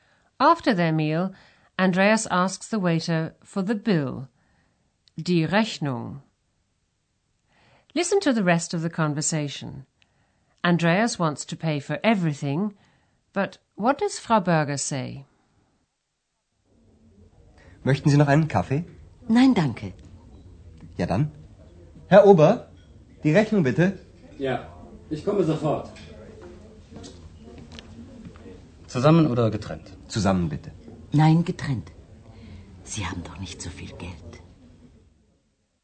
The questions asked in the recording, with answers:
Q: Andreas wants to pay for everything, but what does Frau Berger say?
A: But Frau Berger says she would rather have a separate bill.